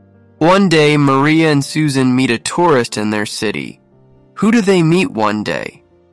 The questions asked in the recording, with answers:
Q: Who do they meet one day?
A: They meet a tourist in their city.